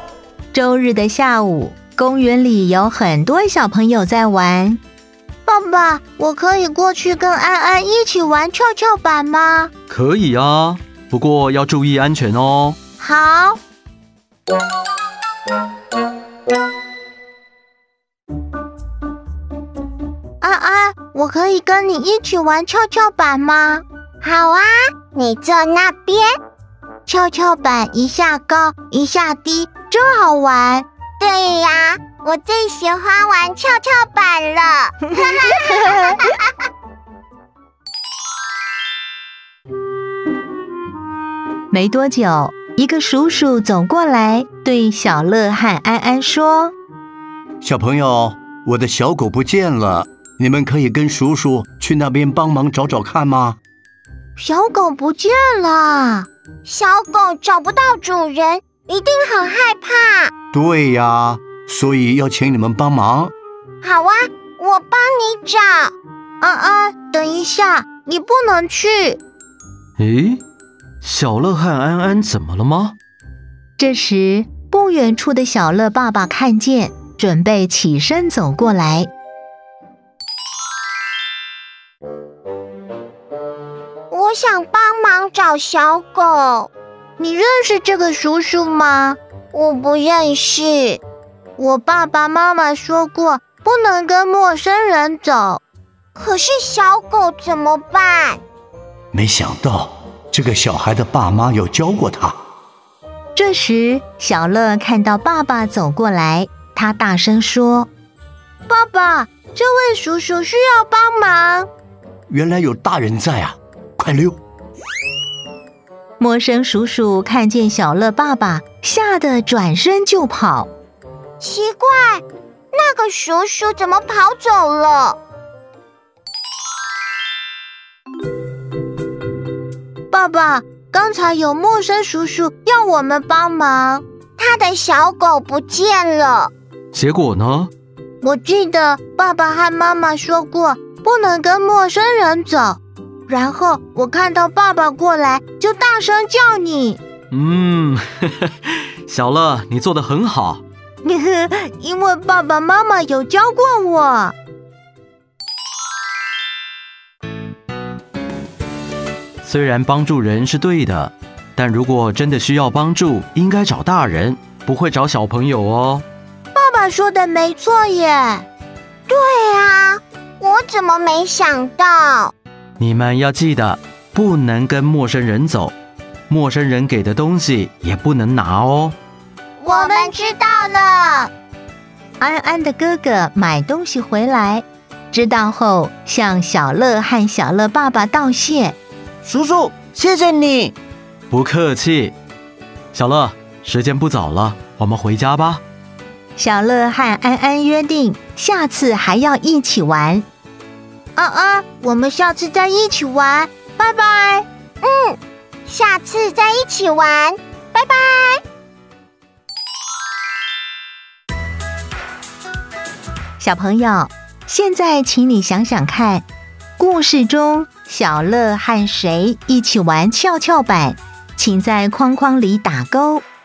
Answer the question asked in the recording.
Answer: 安安。